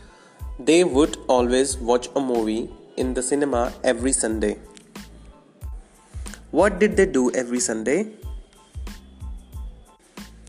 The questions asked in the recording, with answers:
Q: What did they do every Sunday?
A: They used to watch a movie on every Sunday.